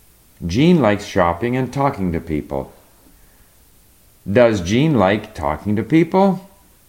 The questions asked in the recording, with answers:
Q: Does Jean like talking to people?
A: Yes, Jean likes talking to people and shopping.